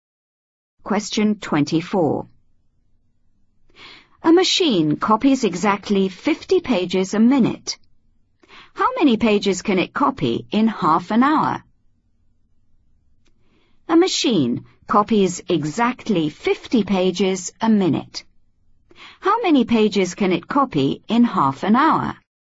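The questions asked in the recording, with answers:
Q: How many pages can it copy in half an hour?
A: 1500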